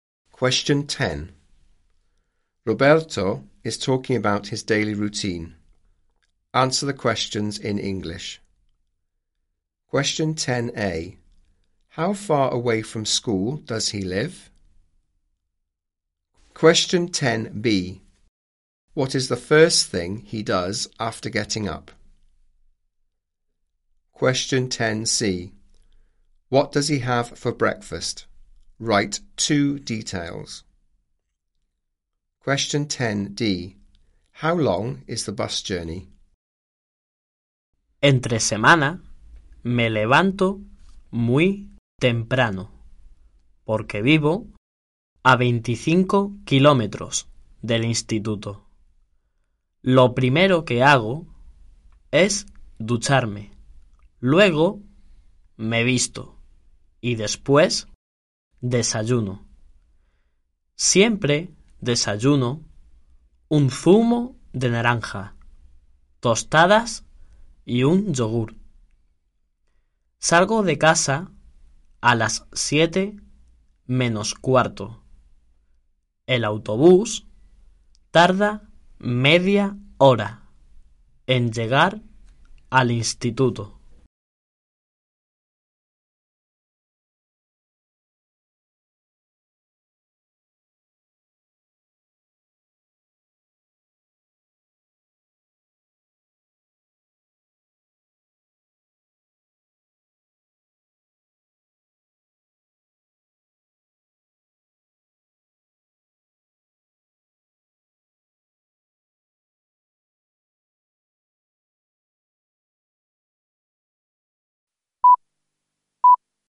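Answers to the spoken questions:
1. 25 kilometres
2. He has a shower
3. Orange juice, toast and a yoghurt
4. Half an hour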